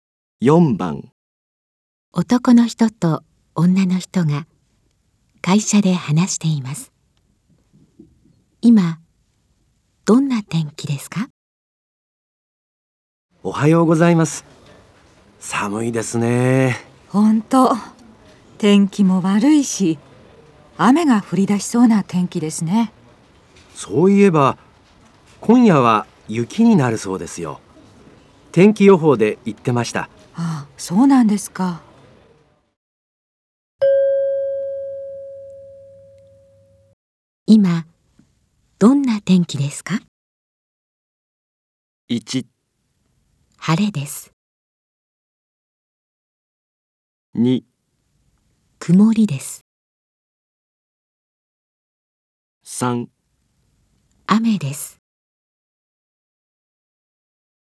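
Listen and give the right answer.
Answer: 2: 曇りです。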